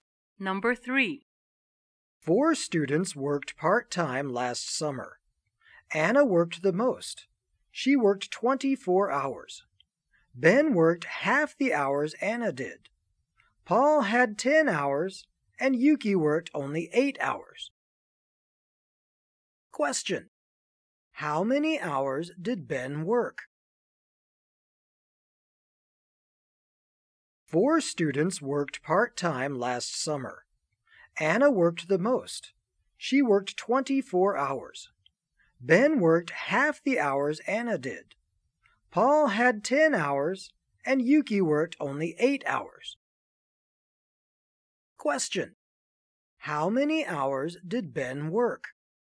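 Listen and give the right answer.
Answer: 12 hours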